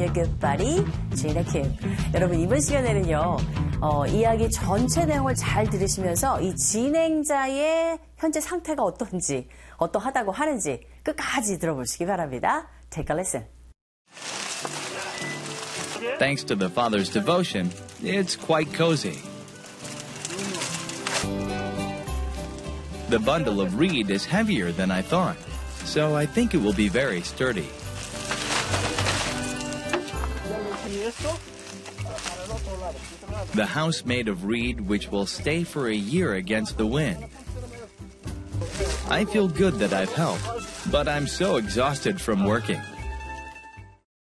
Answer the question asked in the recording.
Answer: 일을 해서 너무 지친 상태가 되겠네요.